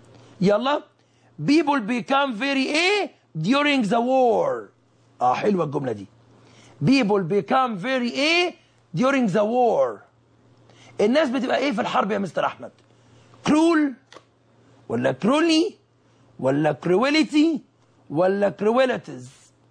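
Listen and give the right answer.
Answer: A: cruel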